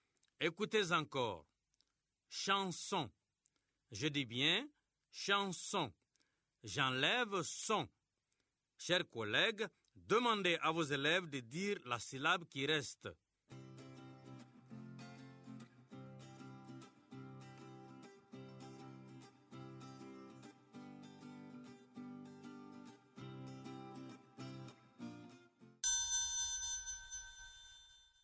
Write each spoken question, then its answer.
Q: Chanson. Je dis bien chanson. J'enlève son. Chers collègues, demandez à vos élèves de dire la syllabe qui reste.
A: Il reste chant.